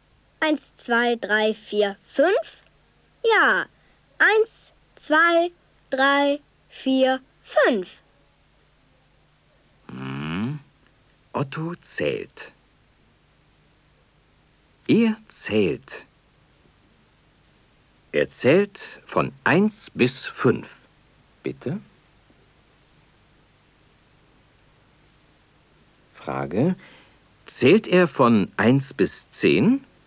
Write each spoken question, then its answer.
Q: Zählt er von 1 bis 10?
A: Nein, er zählt nicht von 1 bis 10.